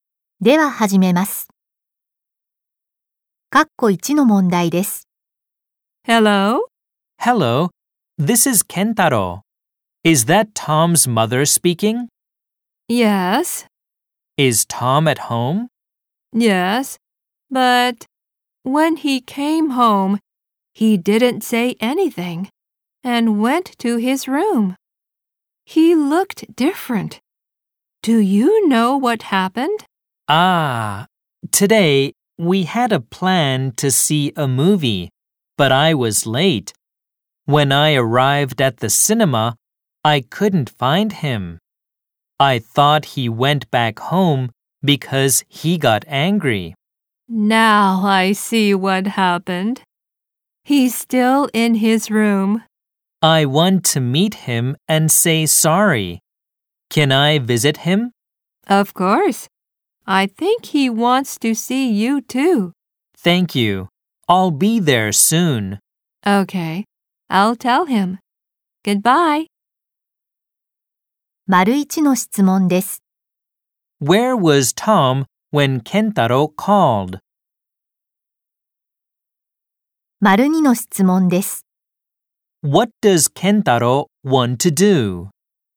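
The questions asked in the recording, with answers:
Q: Where was Tom when Kentaro called?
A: In his room at home

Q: What does Kentaro want to do?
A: Meet Tom and say sorry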